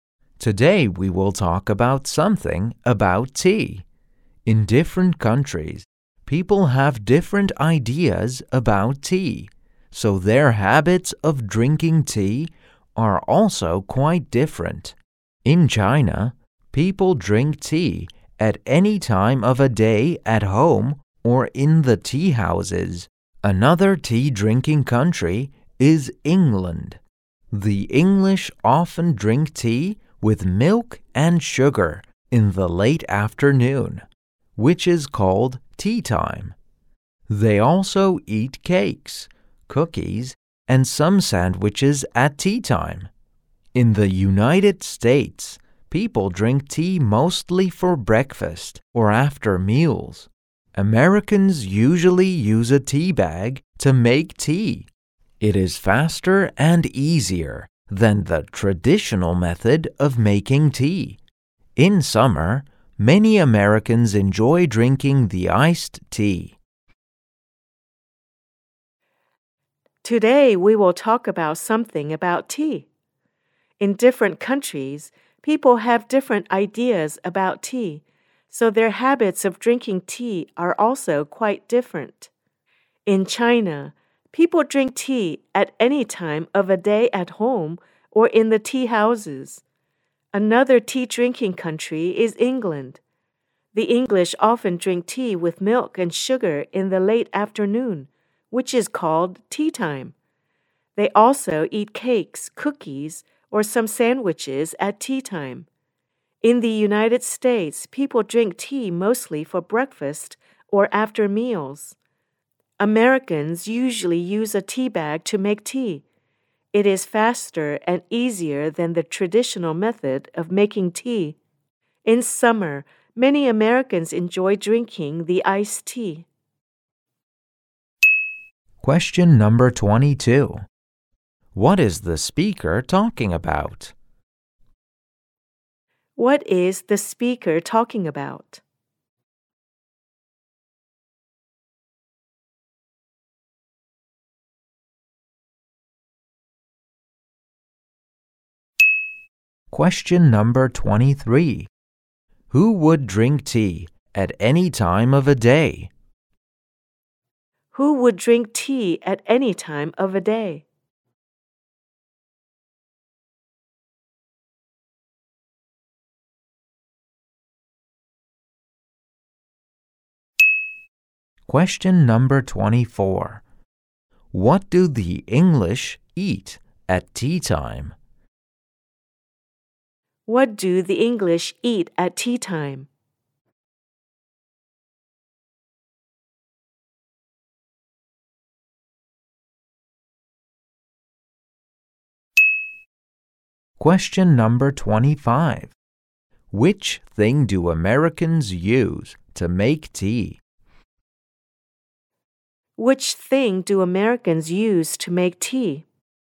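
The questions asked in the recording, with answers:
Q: What is the speaker talking about?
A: Tea-drinking habits in different countries

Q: Who would drink tea at any time of a day?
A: Chinese people

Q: What do the English eat at tea time?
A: Cakes, cookies and sandwiches

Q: Which thing do Americans use to make tea?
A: A tea bag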